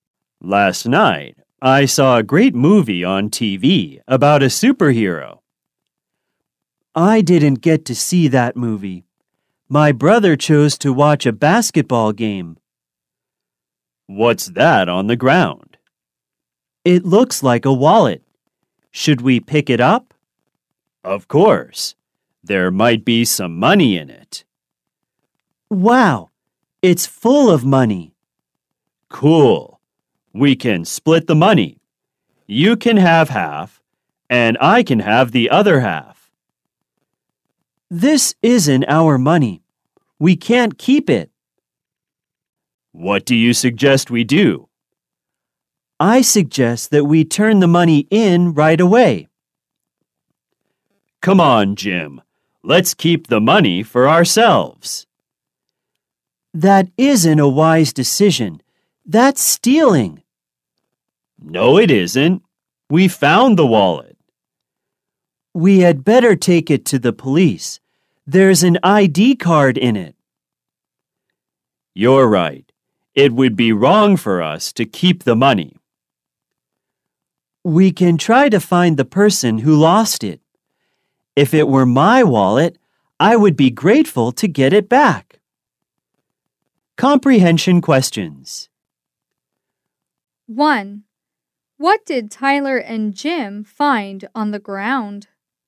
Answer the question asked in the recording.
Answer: They found a wallet on the ground.